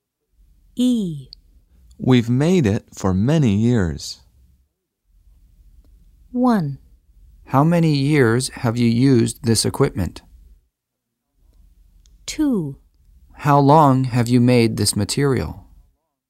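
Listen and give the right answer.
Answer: 2: How long have you made this material?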